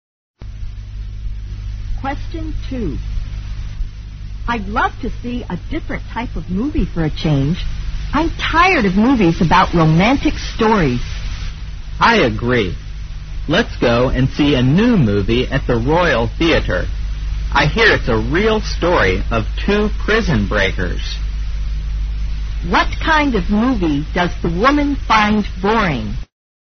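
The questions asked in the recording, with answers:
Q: What kind of movie does the woman find boring?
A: Romantic movies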